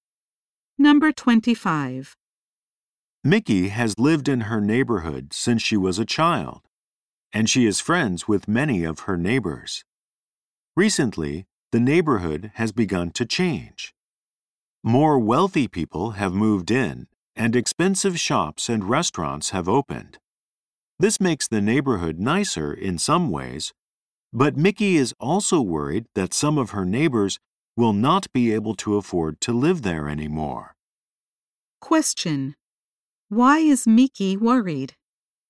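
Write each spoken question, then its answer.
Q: Why is Mickey worried?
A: Some of her neighbors may not be able to afford to live there anymore.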